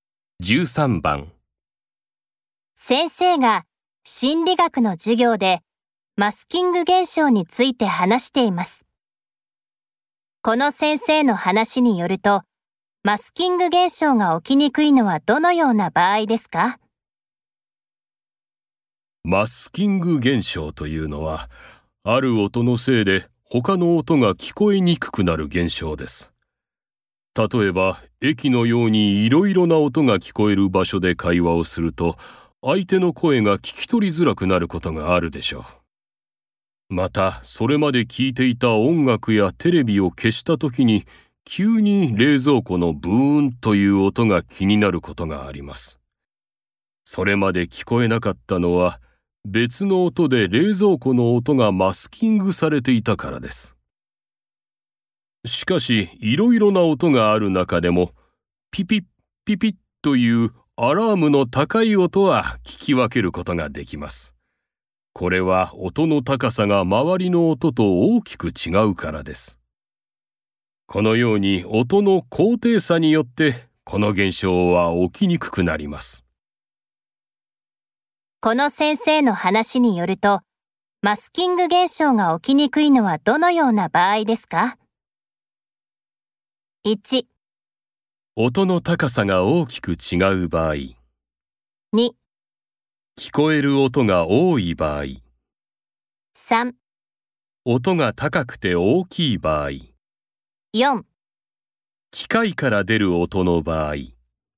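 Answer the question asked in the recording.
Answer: 1: 音の高さが大きく違う場合。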